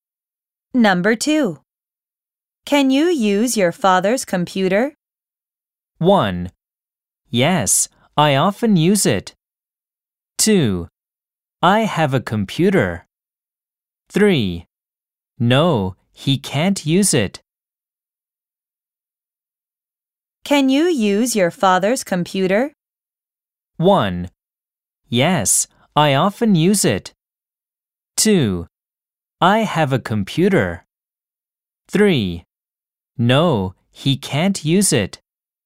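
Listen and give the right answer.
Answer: 1: Yes, I often use it.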